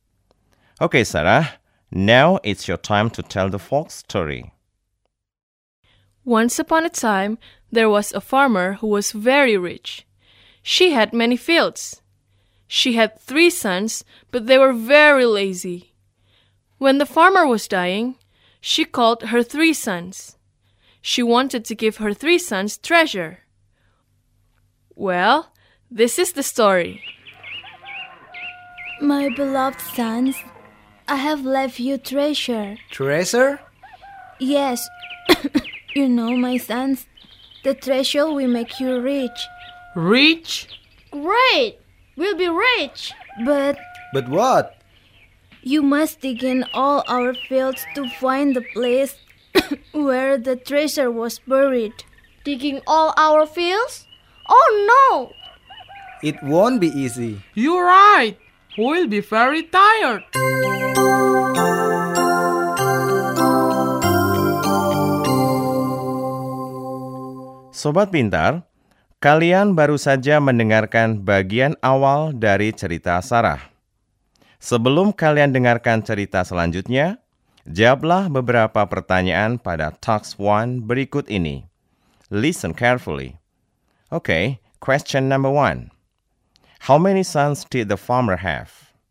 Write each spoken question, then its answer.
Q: How many sons did the farmer have?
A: 3. Right. The farmer had 3 sons.